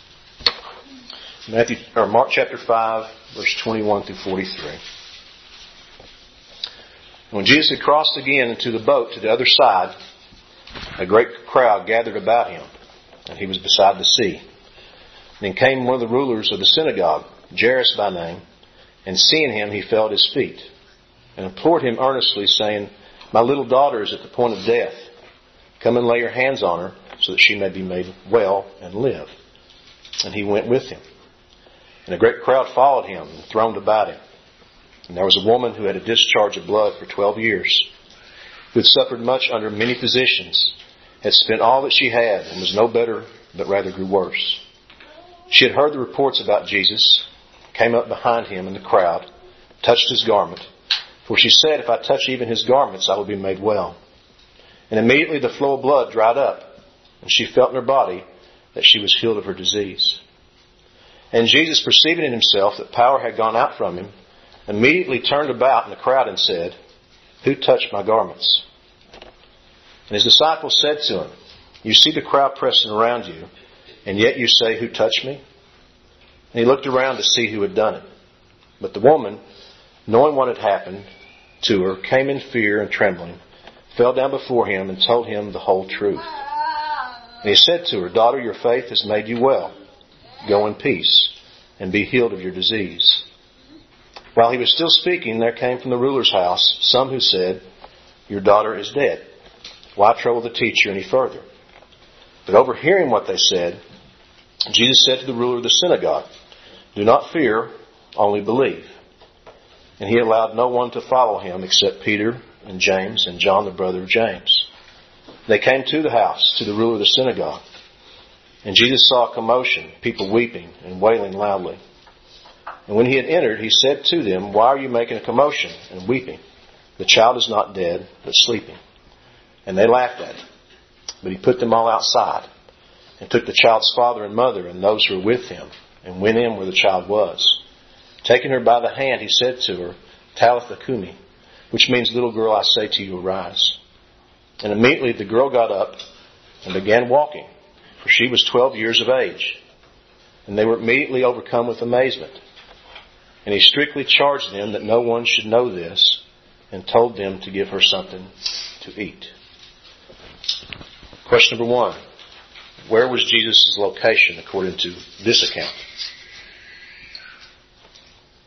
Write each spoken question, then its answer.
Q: Where was Jesus' location according to this account?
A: Last part of verse 21. He was beside the sea.